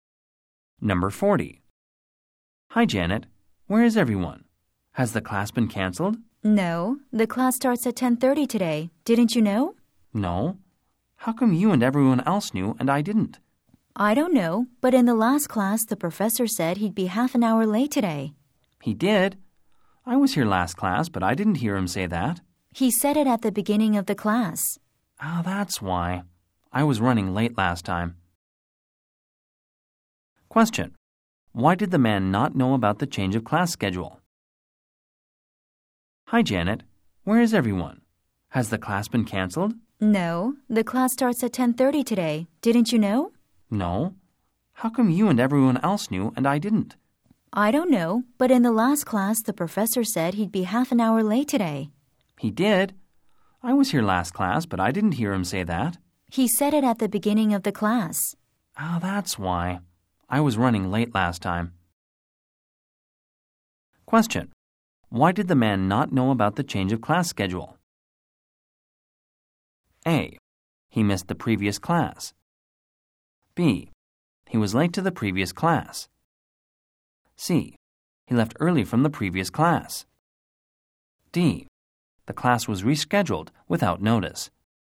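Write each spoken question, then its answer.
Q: Why did the man not know about the change of class schedule?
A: B: He was late to the previous class.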